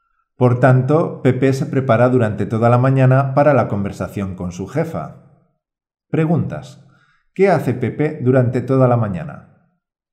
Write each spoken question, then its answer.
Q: ¿Qué hace Pepe durante toda la mañana?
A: Durante toda la mañana, Pepe se prepara para la conversación con su jefa.